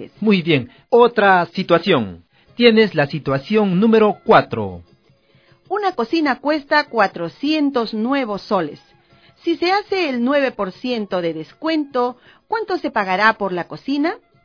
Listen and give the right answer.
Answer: Se pagará 364 nuevos soles.